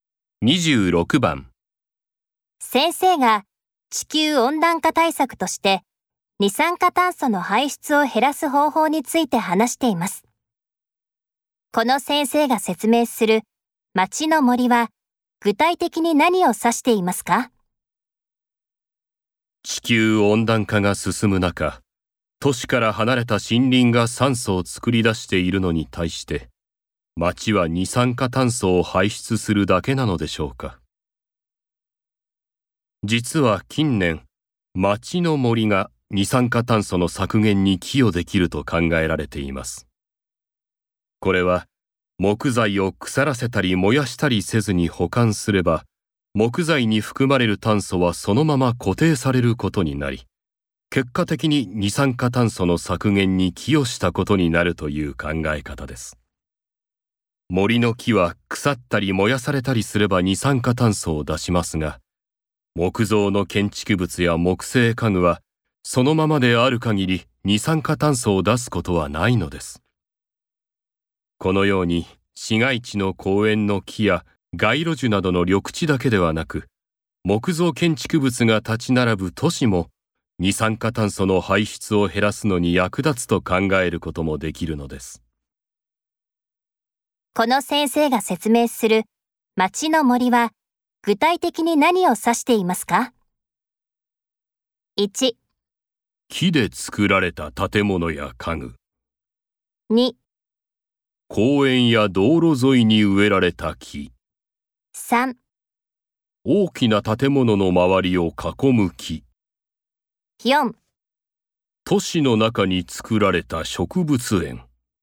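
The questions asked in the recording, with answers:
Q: この先生が説明する街の森は具体的に何を指していますか?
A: 1: 木で作られた建物や家具。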